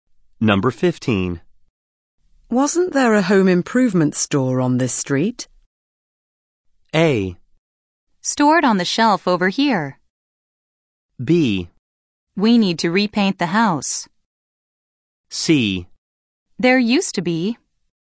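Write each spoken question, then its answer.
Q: Wasn't there a home improvement store on this street?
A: C: There used to be.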